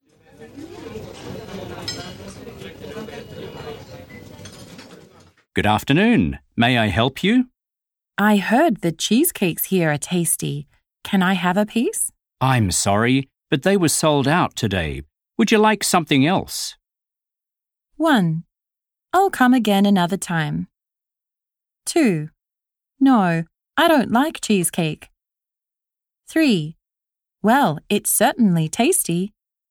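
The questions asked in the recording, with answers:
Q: Would you like something else?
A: 1: I'll come again another time.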